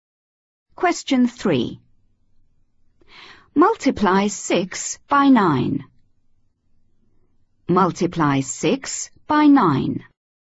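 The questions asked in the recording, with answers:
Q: Multiply 6 by 9.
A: 54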